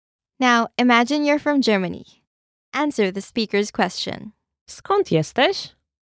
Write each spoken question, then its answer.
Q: Skąd jesteś?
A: Jestem z Niemiec.